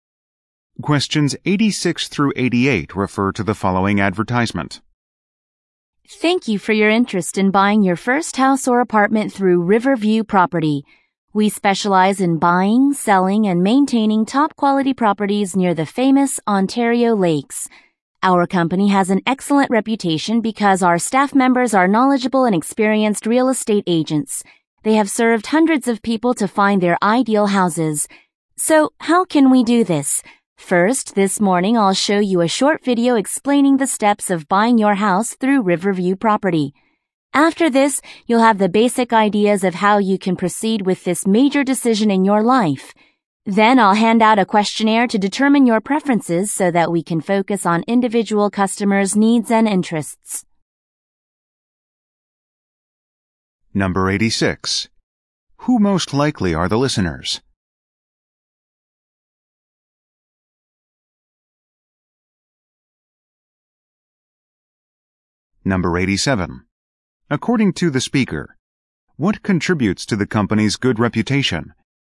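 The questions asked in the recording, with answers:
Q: Who most likely are the listeners?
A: First-time home buyers

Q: According to the speaker, what contributes to the company's good reputation?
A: Its knowledgeable and experienced staff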